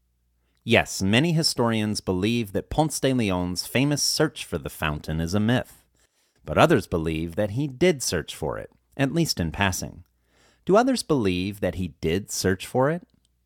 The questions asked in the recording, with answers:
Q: Do others believe that he did search for it?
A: Yes, others believe that he did search for it.